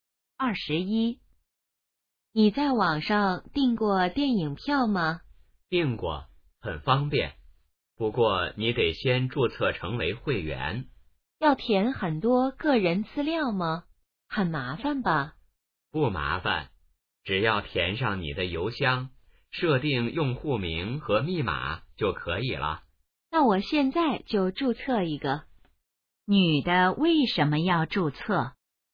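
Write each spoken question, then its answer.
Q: 女的为什么要注册?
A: 想在网上订电影票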